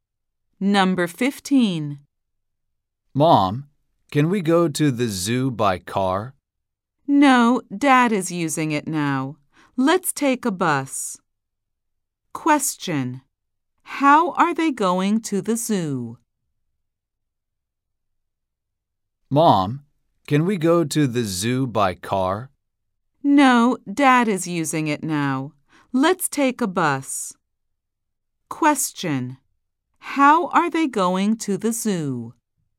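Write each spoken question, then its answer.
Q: How are they going to the zoo?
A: By bus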